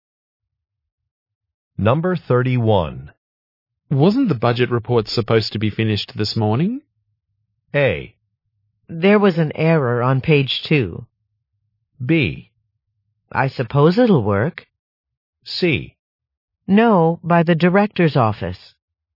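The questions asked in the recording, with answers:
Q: Wasn't the budget report supposed to be finished this morning?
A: A: There was an error on page 2.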